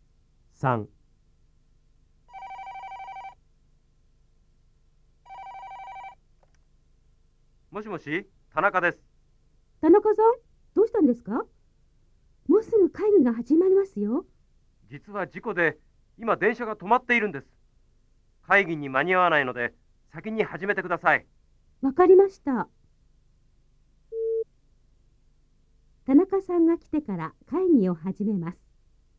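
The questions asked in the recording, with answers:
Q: 田中さんが来てから会議を始めます。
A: ×(先に始める)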